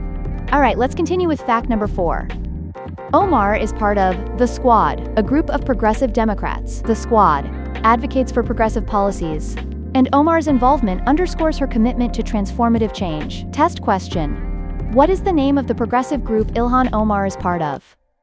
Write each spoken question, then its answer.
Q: What is the name of the progressive group Ilhan Omar is part of?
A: Correct answer. The Squad.